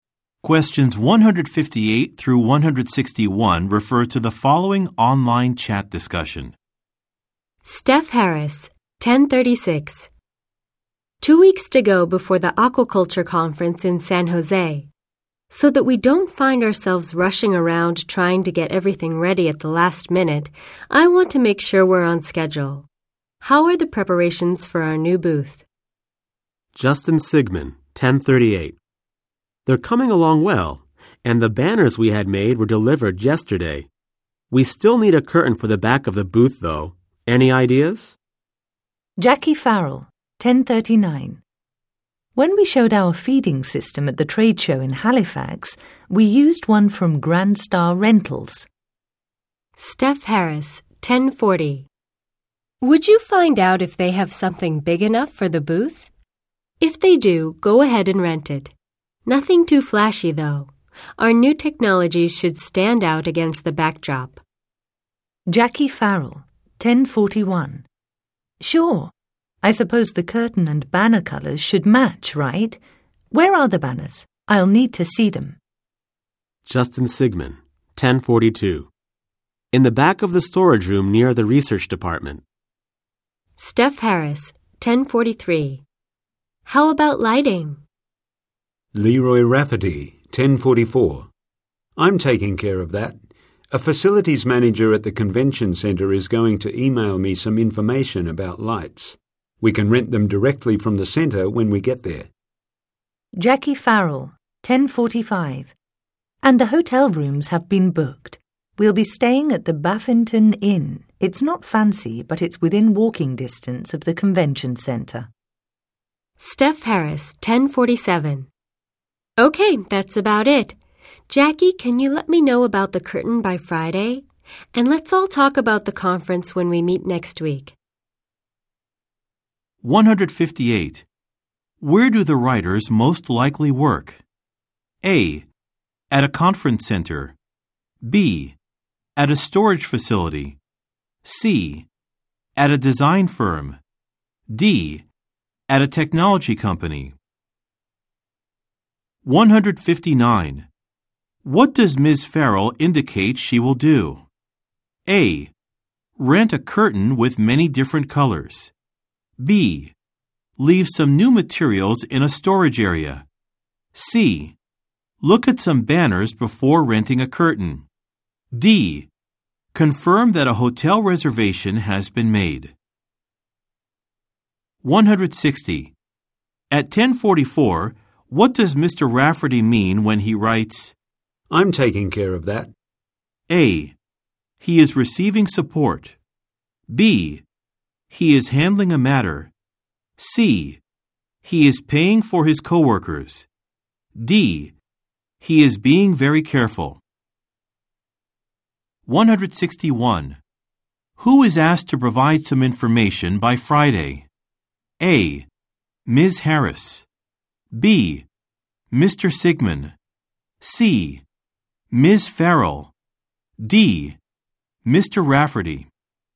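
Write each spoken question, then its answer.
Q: Where do the writers most likely work?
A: D: At a technology company.

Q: What does Ms. Farrell indicate she will do?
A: C: Look at some banners before renting a curtain.

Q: At 1044, what does Mr. Rafferty mean when he writes, I'm taking care of that?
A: B: He is handling a matter.

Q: Who is asked to provide some information by Friday?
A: C: Ms. Farrell.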